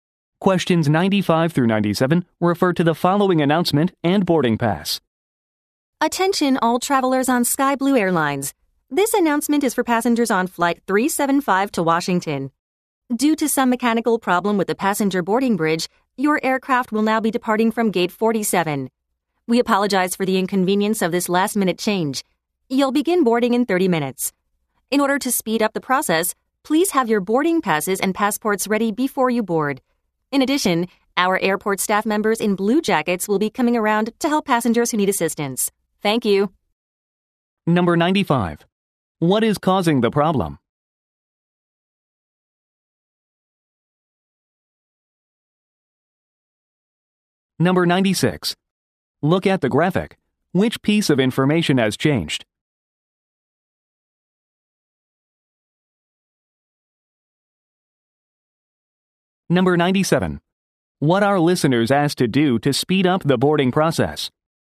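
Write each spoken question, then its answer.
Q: What is causing the problem?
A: A mechanical problem with the passenger boarding bridge

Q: What are listeners asked to do to speed up the boarding process?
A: Have boarding passes and passports ready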